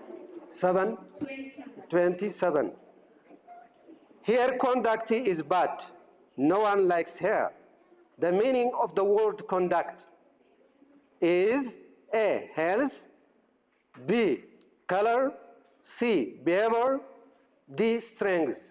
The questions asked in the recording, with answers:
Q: The meaning of the word conduct is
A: C, behavior.